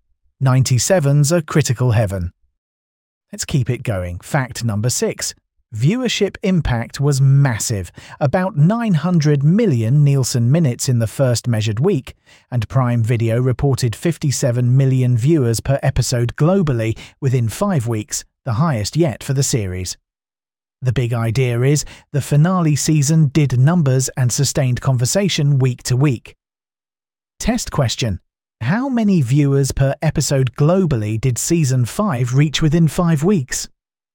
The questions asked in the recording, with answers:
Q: How many viewers per episode globally did Season 5 reach within 5 weeks?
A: 57 million.